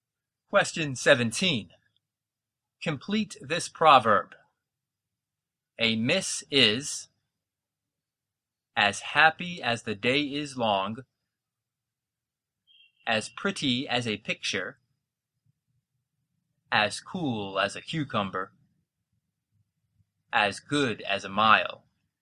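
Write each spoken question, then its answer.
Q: Complete this proverb.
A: D: as good as a mile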